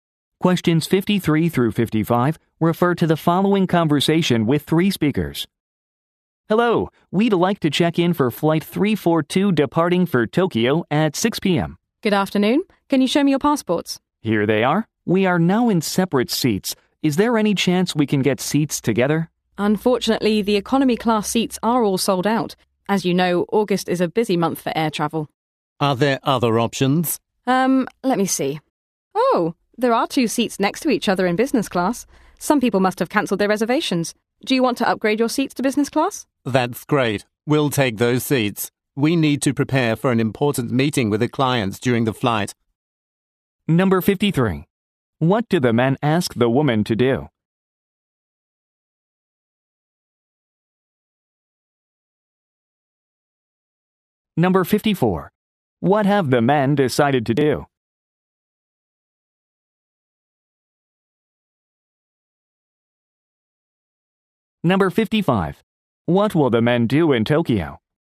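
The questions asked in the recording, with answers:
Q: What do the men ask the woman to do?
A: Give them seats together

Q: What have the men decided to do?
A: Upgrade to business class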